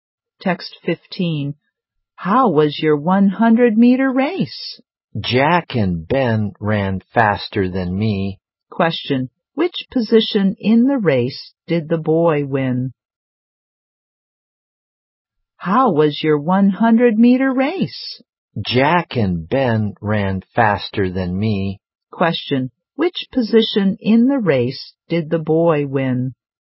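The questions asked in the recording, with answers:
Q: Which position in the race did the boy win?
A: Third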